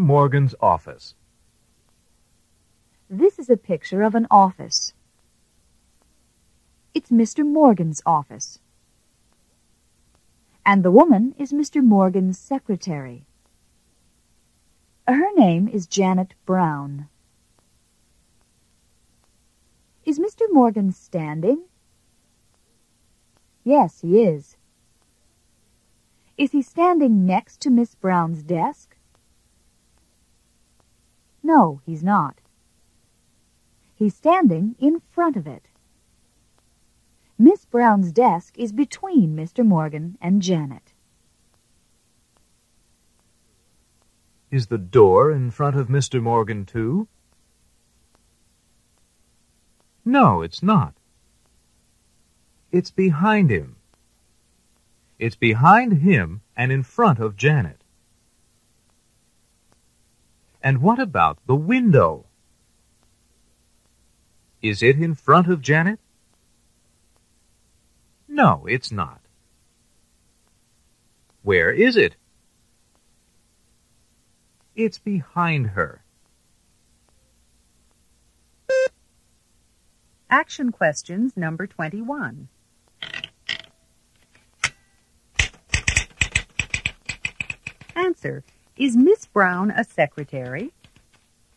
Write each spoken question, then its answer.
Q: Is Miss Brown a secretary?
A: Yes, she is.